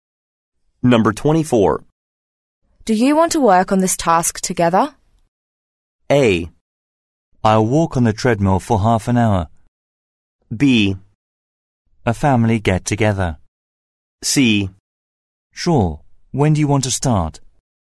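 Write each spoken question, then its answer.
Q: Do you want to work on this task together?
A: C: Sure. When do you want to start?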